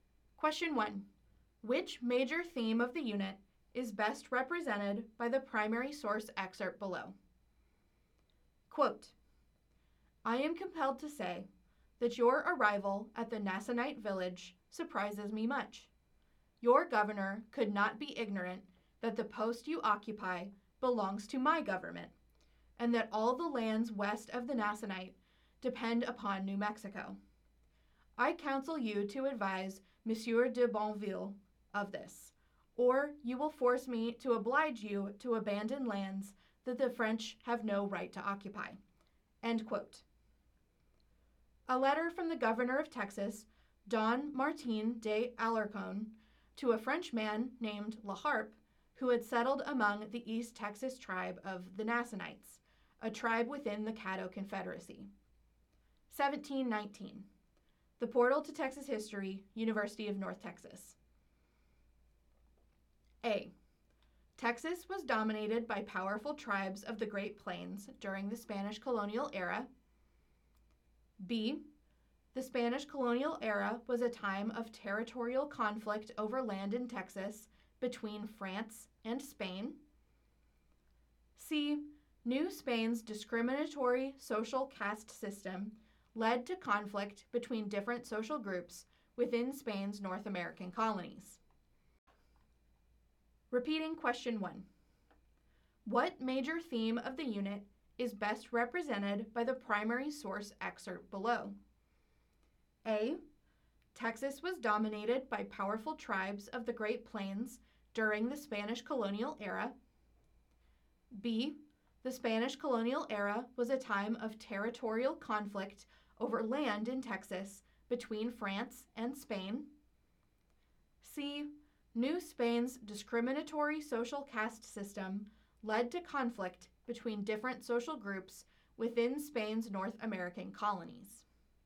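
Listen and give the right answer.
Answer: B: The Spanish colonial era was a time of territorial conflict over land in Texas between France and Spain.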